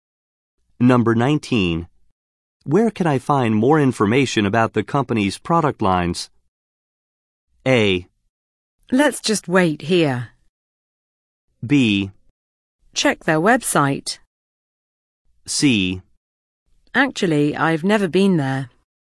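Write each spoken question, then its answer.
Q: Where can I find more information about the company's product lines?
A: B: Check their website.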